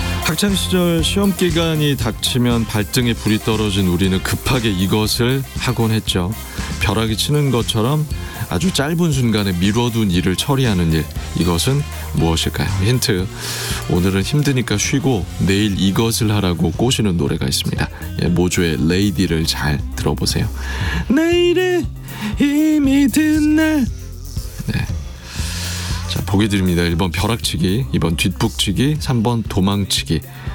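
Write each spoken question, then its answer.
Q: 벼락이 치는 것처럼 아주 짧은 순간에 미뤄둔 일을 처리하는 일, 이것은 무엇일까요?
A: 1번: 벼락치기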